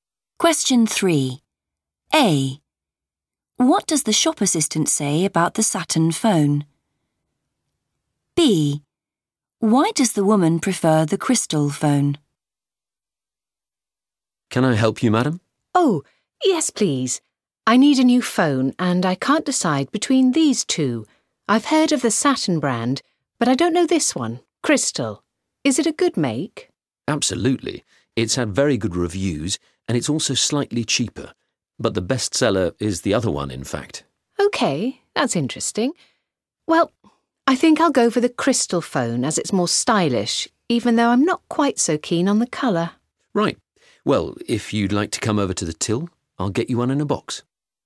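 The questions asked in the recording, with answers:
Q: What does the shop assistant say about the Saturn phone?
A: it is the best seller

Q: Why does the woman prefer the crystal phone?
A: it is more stylish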